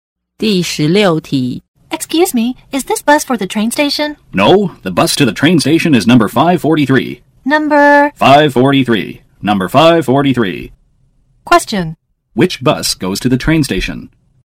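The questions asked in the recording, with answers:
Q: Which bus goes to the train station?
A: Number 543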